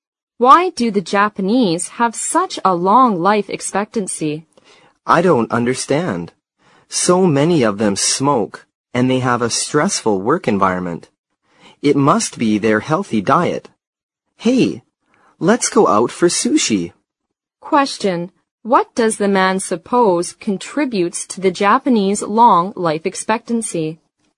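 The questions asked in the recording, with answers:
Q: What does the man suppose contributes to the Japanese long life expectancy?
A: Their healthy diet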